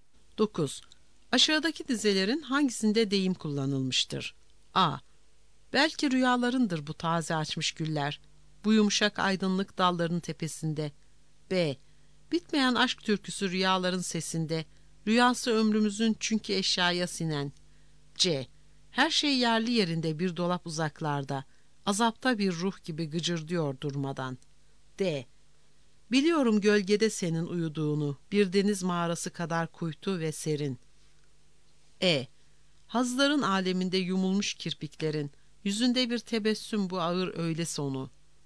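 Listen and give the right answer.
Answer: C: Her şey yerli yerinde bir dolap uzaklarda, azapta bir ruh gibi gıcırdıyor durmadan.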